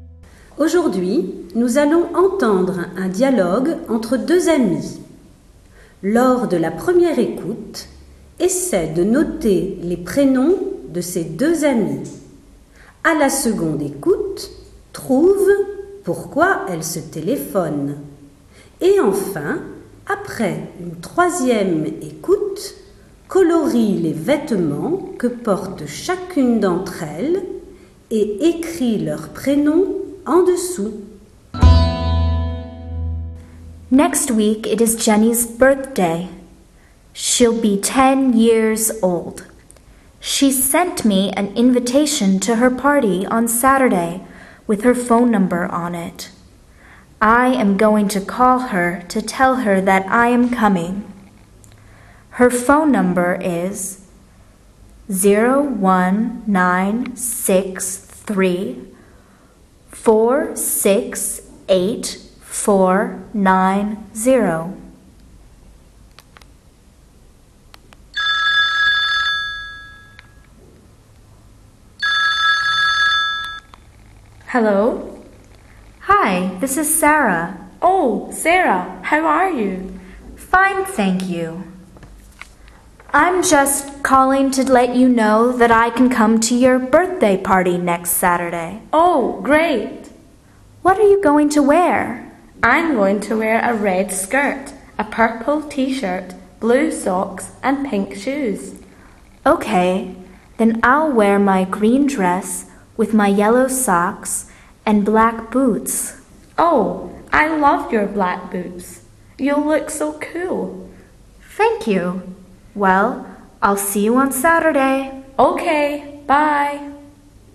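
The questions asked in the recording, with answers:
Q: Lors de la première écoute, essaie de noter les prénoms de ces deux amis.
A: Jenny et Sarah

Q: À la seconde écoute, trouve pourquoi elles se téléphonent.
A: Sarah appelle Jenny pour lui dire qu'elle peut venir à sa fête d'anniversaire samedi prochain.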